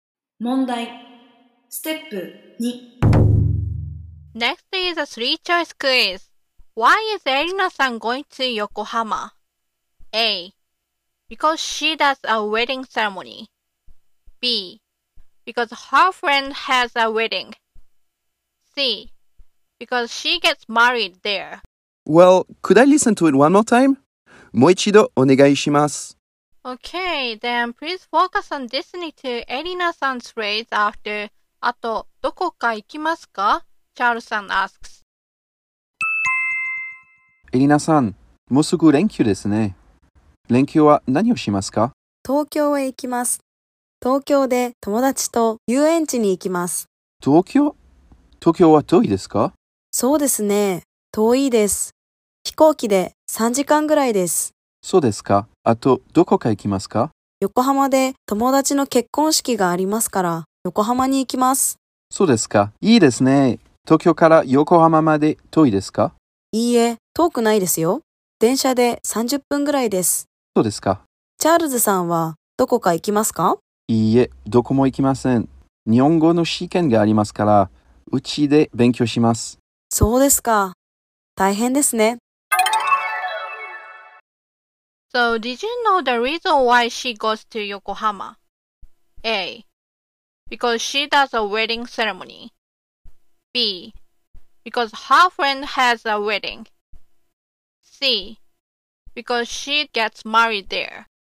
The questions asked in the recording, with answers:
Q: Why is erina san going to Yokohama?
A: So the answer is B.